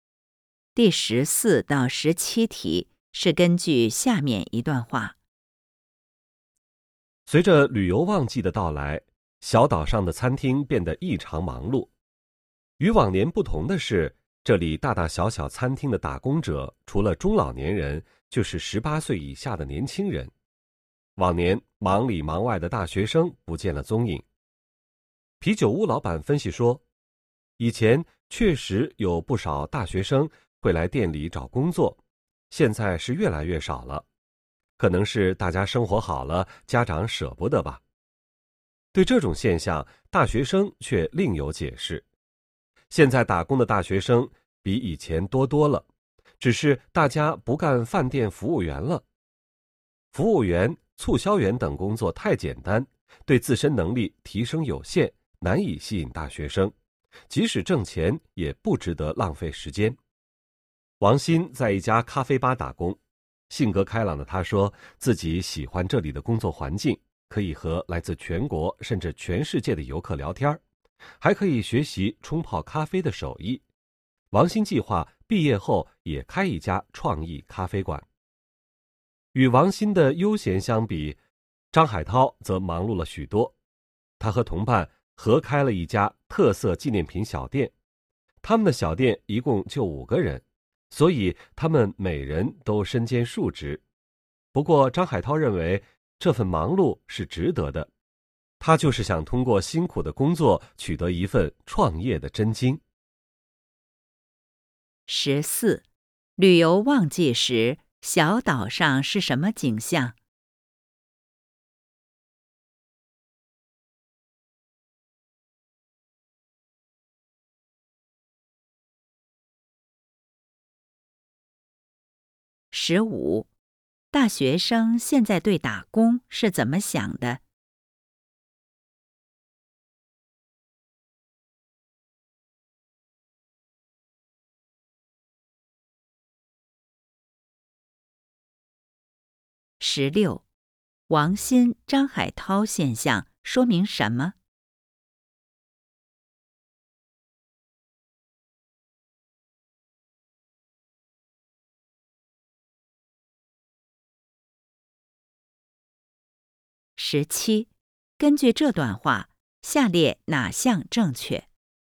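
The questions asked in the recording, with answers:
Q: 旅游旺季时,小岛上是什么景象?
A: 餐厅异常忙碌,打工者多是中老年人和十八岁以下的年轻人,不见大学生

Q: 大学生现在对打工是怎么想的?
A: 服务员等工作太简单,对能力提升有限,不值得浪费时间

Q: 王鑫、张海涛现象说明什么?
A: 大学生打工更注重提升能力、为创业积累经验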